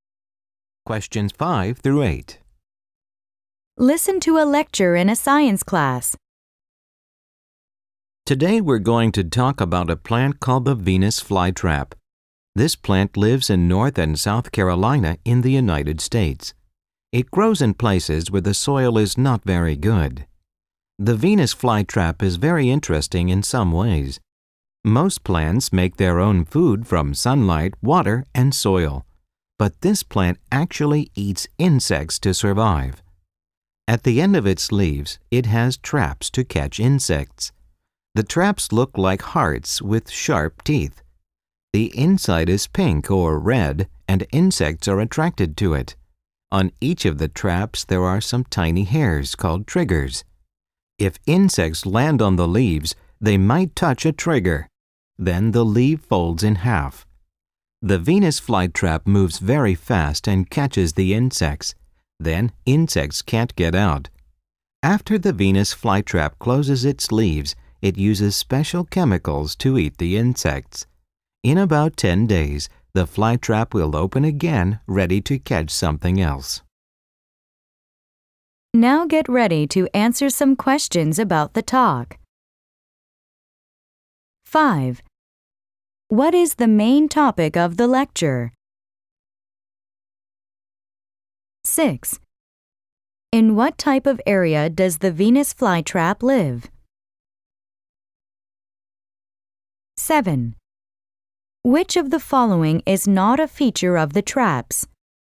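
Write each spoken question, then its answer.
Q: What is the main topic of the lecture?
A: The Venus flytrap

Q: In what type of area does the Venus flytrap live?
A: Places where the soil is not very good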